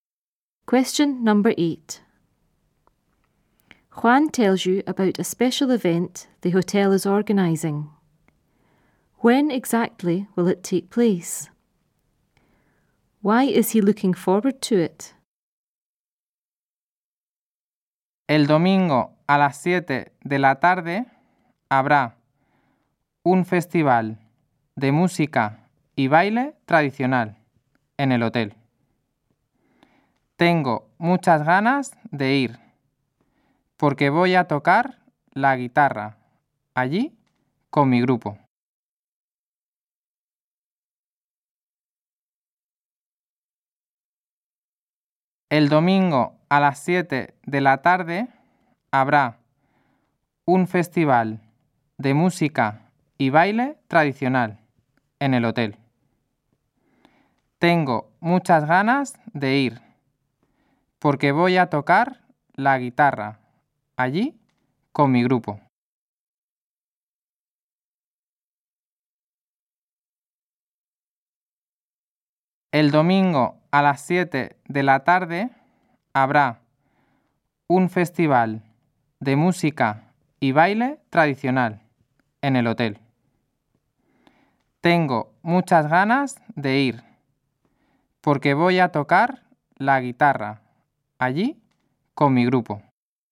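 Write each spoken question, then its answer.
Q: When exactly will it take place?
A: Sunday at 7 in the evening

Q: Why is he looking forward to it?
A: He will play guitar there with his group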